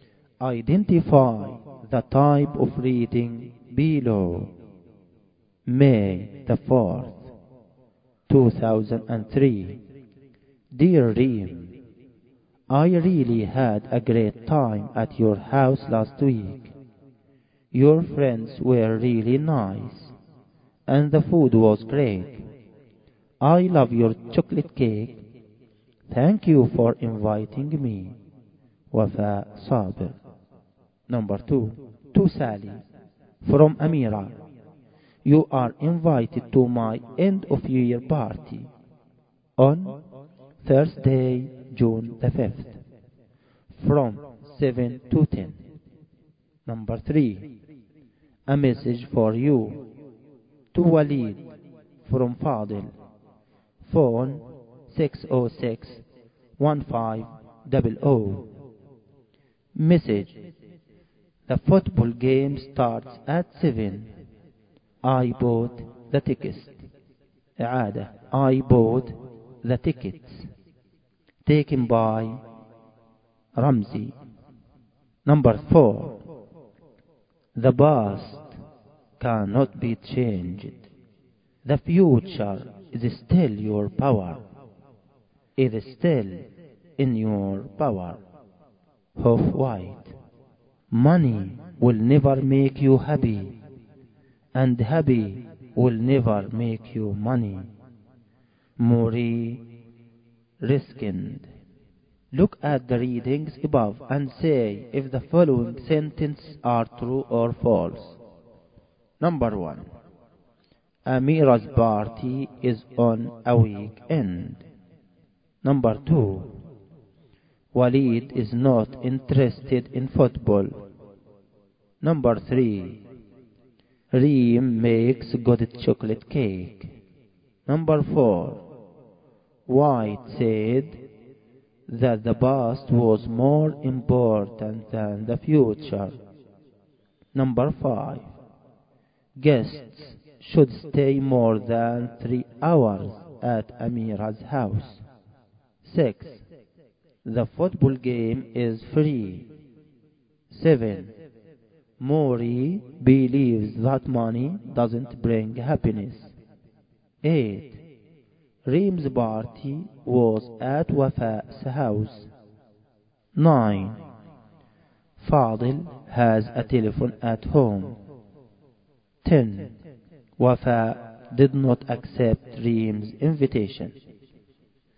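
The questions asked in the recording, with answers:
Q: Walid is not interested in football.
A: False

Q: Reem makes good chocolate cake.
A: True

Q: White said that the past was more important than the future.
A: False

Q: Guests should stay more than 3 hours at Amira's house.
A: False

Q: The football game is free.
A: False

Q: Maury believes that money doesn't bring happiness.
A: True

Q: Reem's party was at Wafa's house.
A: False

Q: Wafa did not accept Reem's invitation.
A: False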